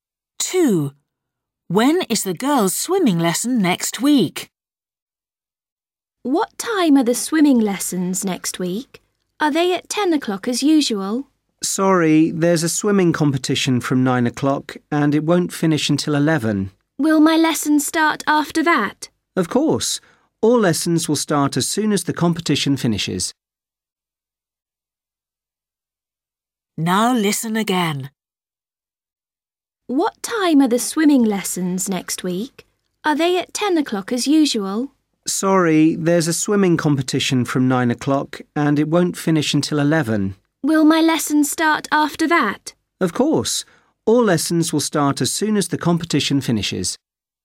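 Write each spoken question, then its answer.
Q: When is the girls' swimming lesson next week?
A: At 11 o'clock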